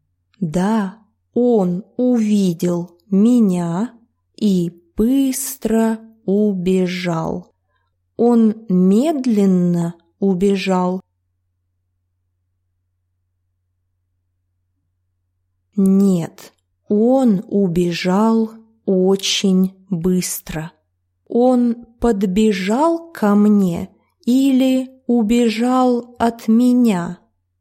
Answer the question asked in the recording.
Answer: К сожалению, он убежал от меня.